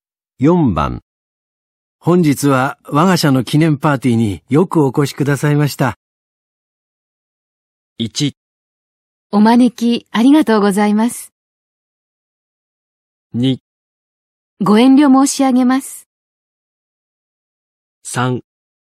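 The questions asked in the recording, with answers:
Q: 本日は我が社の記念パーティーによくお越しくださいました。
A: 1: お招きありがとうございます。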